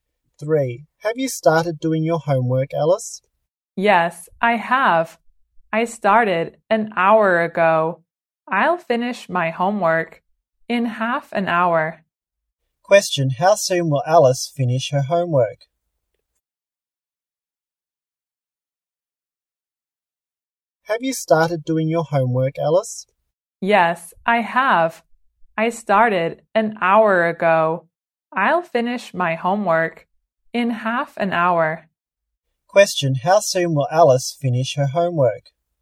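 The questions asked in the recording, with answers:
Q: how soon will Alice finish her homework?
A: In half an hour.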